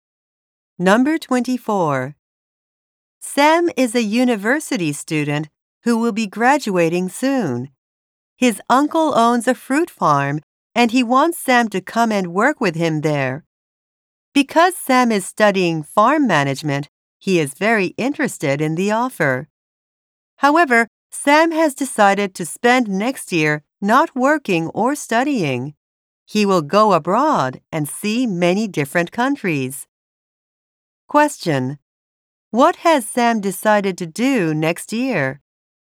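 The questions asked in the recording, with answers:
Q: What has Sam decided to do next year?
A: Travel abroad to see many countries.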